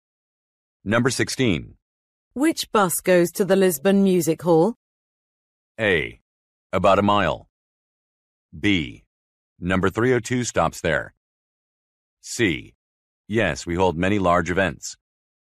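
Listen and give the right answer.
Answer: B: Number 302 stops there.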